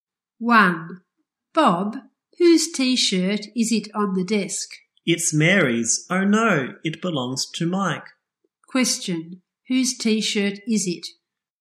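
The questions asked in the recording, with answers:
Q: Question, whose T-shirt is it?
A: Mike's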